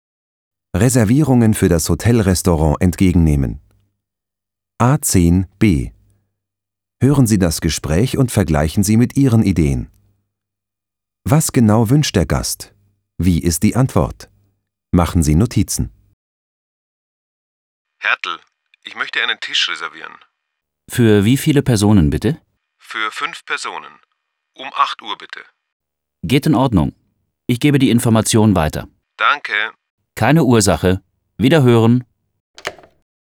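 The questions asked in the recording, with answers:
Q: Was genau wünscht der Gast?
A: Einen Tisch für 5 Personen um 8 Uhr.

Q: Wie ist die Antwort?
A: Geht in Ordnung.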